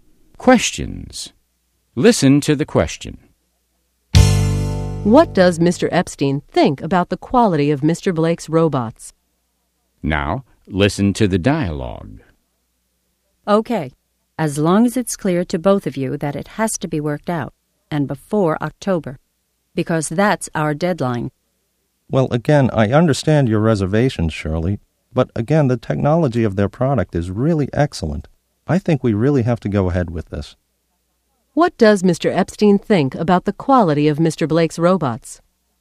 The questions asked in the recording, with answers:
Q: What does Mr. Epstein think about the quality of Mr. Blake's robots?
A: He thinks the technology of their product is excellent.